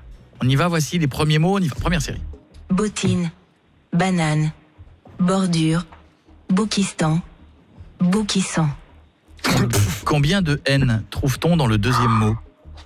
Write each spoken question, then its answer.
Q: Combien de N trouve-t-on dans le deuxième mot ?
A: Deux.